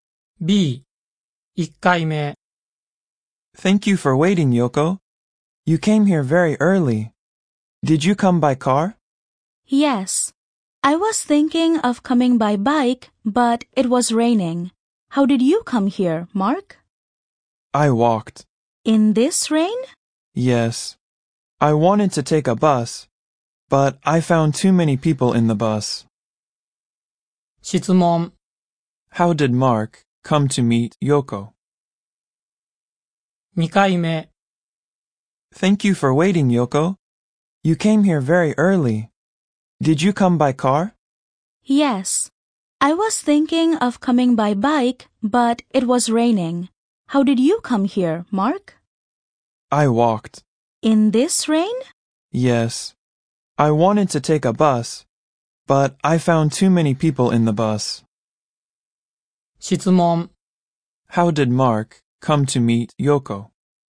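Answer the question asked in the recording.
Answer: He walked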